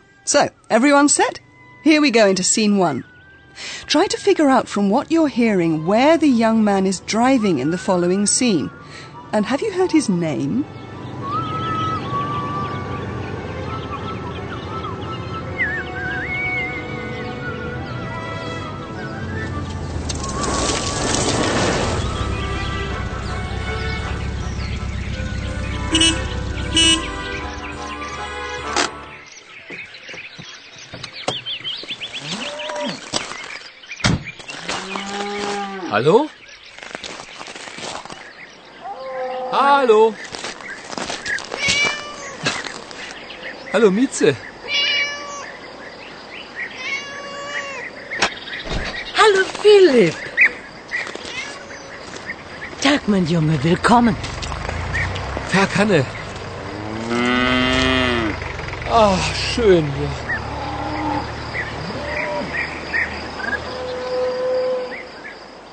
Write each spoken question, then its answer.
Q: And have you heard his name?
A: Maybe you've also gathered that the young man is called Philip